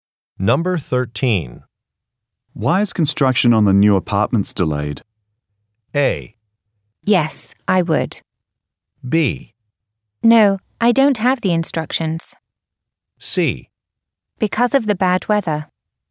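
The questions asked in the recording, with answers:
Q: Why is construction on the new apartments delayed?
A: C: Because of the bad weather.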